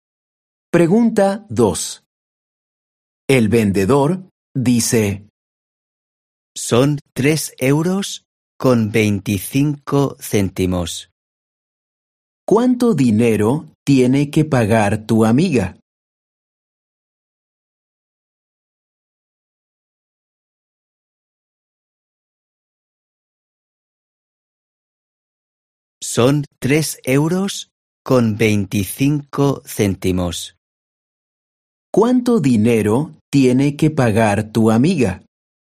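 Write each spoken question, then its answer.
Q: ¿Cuánto dinero tiene que pagar tu amiga?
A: 3 euros con 25 céntimos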